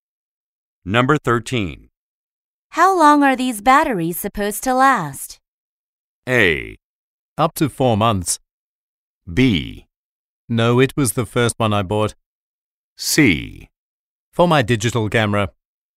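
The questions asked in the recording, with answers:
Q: How long are these batteries supposed to last?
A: A: Up to 4 months.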